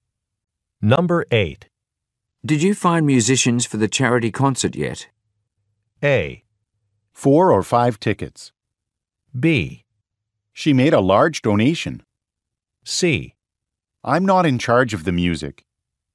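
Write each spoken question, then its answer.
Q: Did you find musicians for the charity concert yet?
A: C: I'm not in charge of the music.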